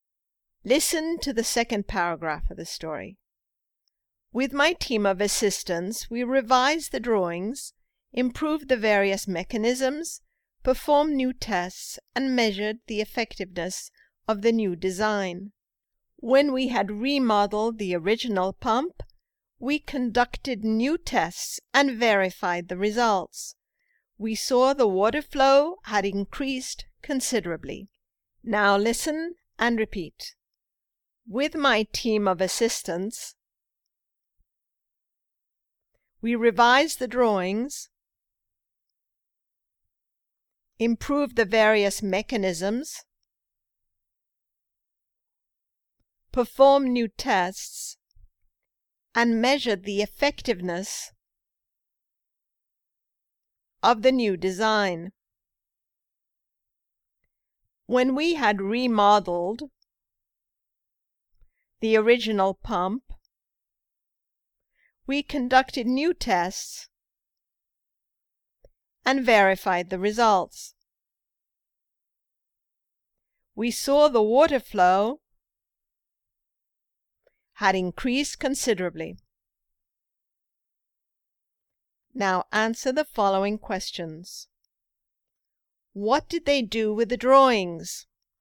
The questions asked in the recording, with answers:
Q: What did they do with the drawings?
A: They revised the drawings.